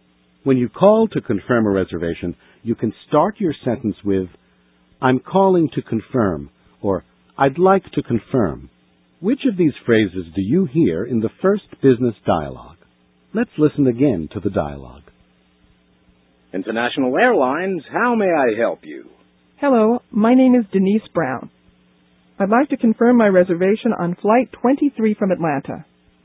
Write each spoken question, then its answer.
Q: Which of these phrases do you hear in the first business dialogue?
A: Ms. Brown said, I'd like to confirm.